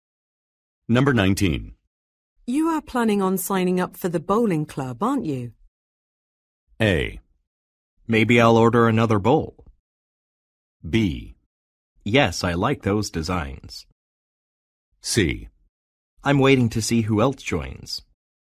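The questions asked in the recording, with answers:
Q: You are planning on signing up for the bowling club, aren't you?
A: C: I'm waiting to see who else joins.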